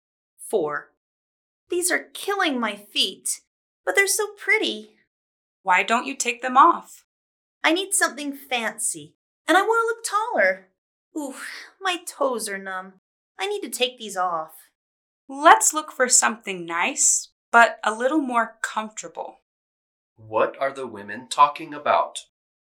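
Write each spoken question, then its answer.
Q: What are the women talking about?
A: Uncomfortable high-heeled shoes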